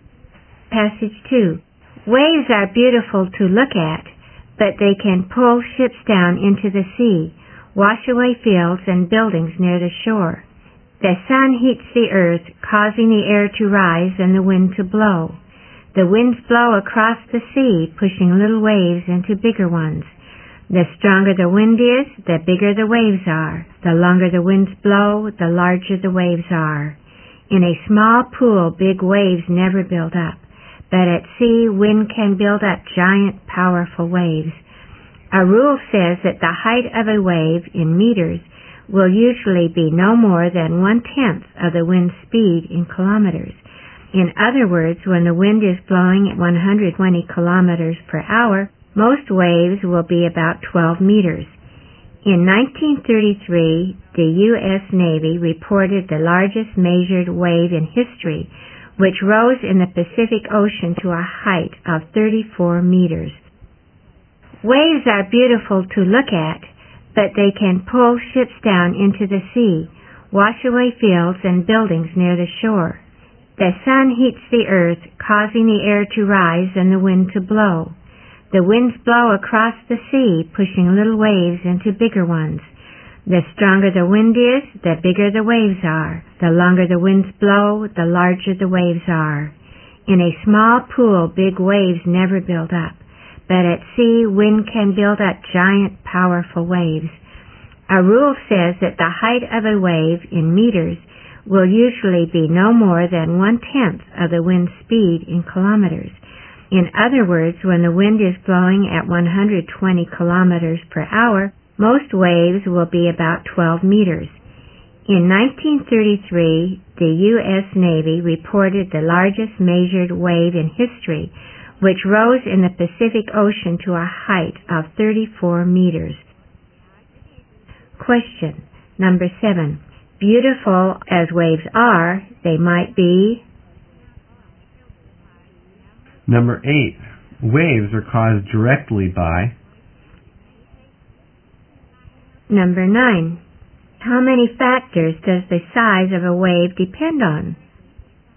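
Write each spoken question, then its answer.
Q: Waves are caused directly by...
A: The wind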